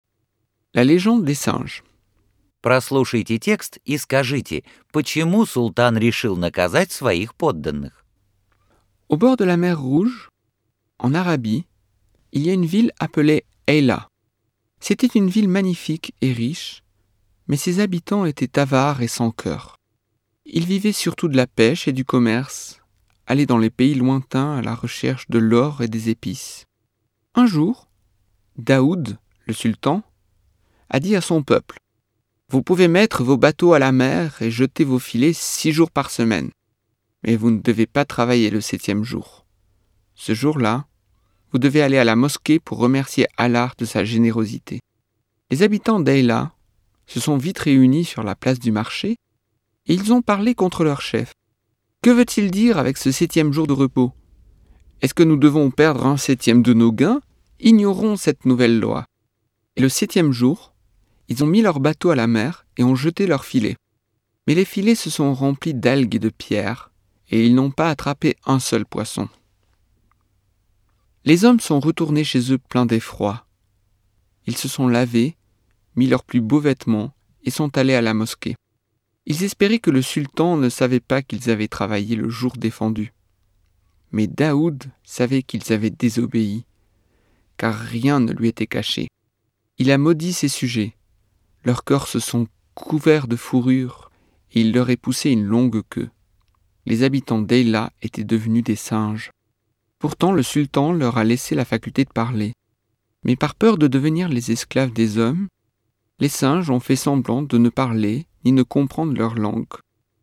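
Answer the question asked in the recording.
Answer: Потому что они ослушались его: вышли в море и работали в запретный седьмой день вместо того, чтобы идти в мечеть.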